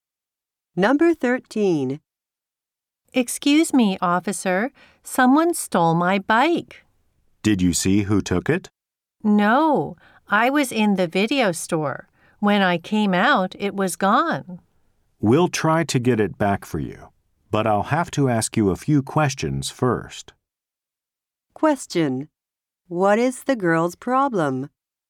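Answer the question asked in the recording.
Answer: Someone stole her bike.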